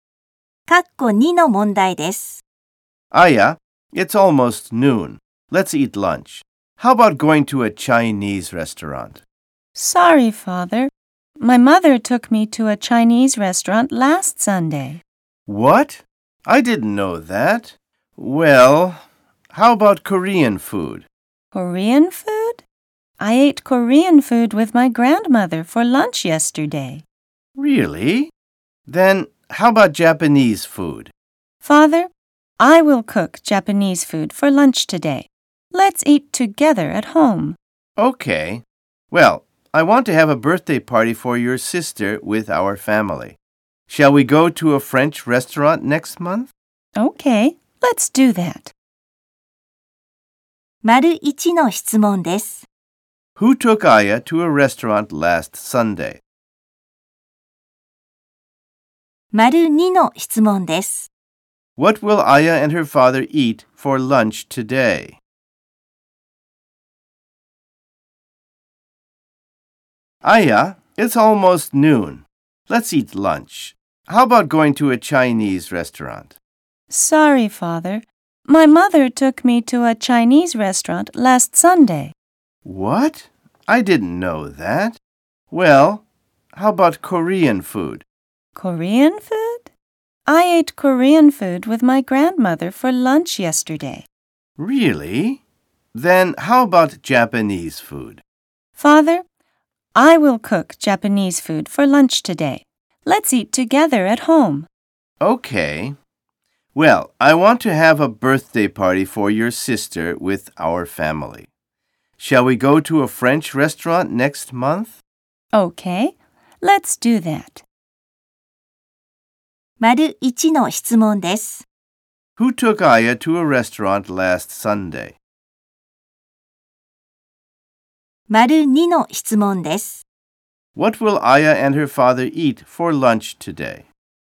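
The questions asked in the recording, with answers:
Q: Who took Aya to a restaurant last Sunday?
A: Her mother

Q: What will Aya and her father eat for lunch today?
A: Japanese food cooked by Aya at home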